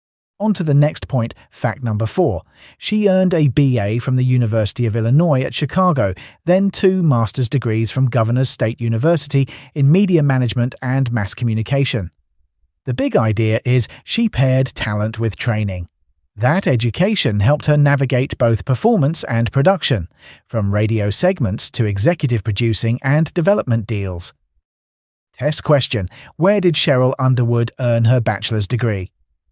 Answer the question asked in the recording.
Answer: Correct answer. University of Illinois at Chicago.